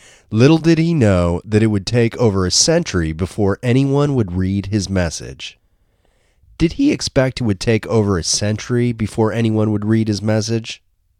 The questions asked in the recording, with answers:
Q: Did he expect it would take over a century before anyone would read his message?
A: No, he didn't expect that it would be over a century before anyone would read his message.